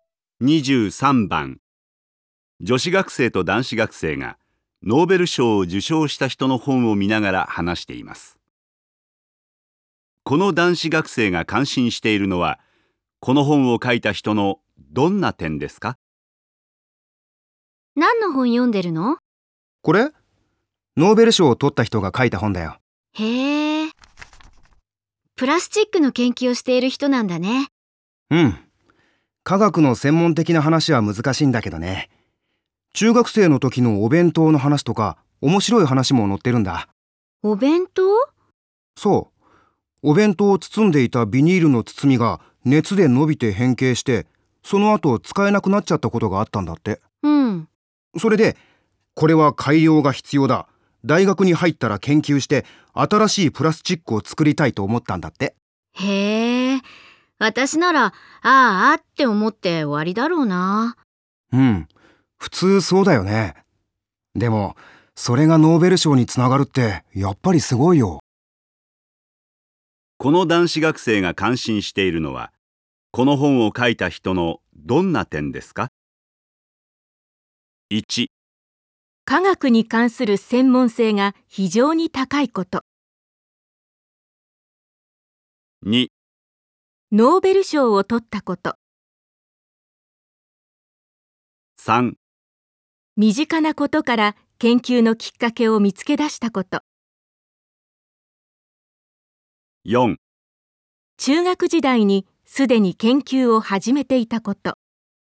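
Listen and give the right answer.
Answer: 3: 身近なことから研究のきっかけを見つけ出したこと。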